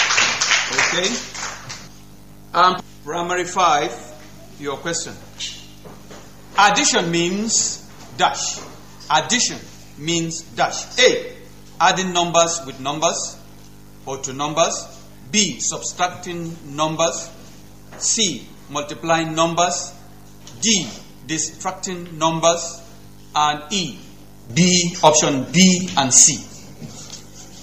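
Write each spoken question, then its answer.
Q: Addition means dash.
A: A: adding numbers with numbers or to numbers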